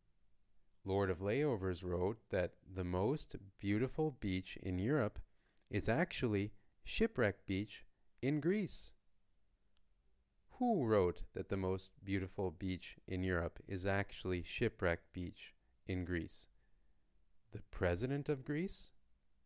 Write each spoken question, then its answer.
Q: Who wrote that the most beautiful beach in Europe is actually Shipwreck Beach in Greece?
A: No, not the president of Greece.